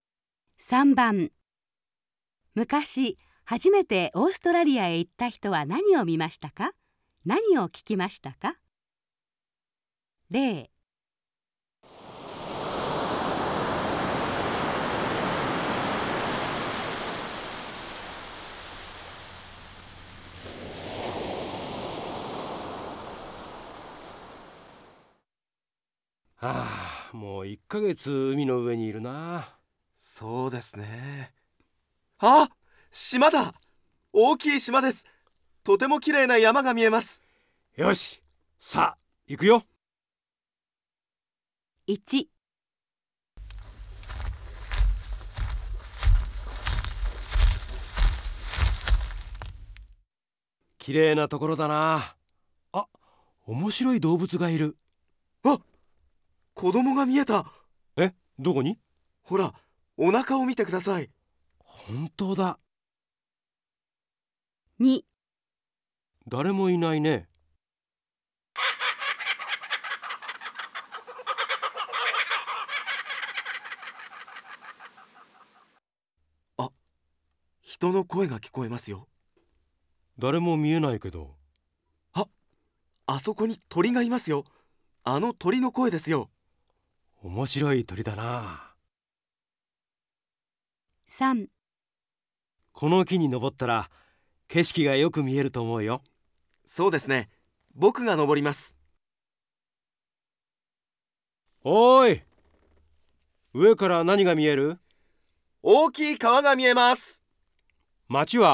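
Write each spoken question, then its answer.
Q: 昔、初めてオーストラリアへ行った人は何を見ましたか?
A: お腹に子供がいる面白い動物

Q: 何を聞きましたか?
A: 人の声のように聞こえる鳥の声

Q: 昔、初めてオーストラリアへ行った人は何を見ましたか?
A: 大きい川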